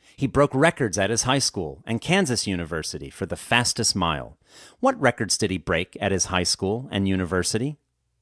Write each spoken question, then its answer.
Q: What records did he break at his high school and university?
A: He broke records at his high school and university for the fastest mile.